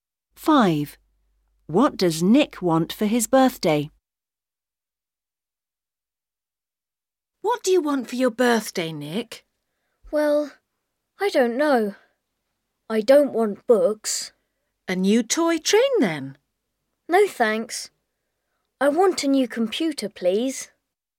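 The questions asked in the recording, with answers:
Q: What does Nick want for his birthday?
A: A new computer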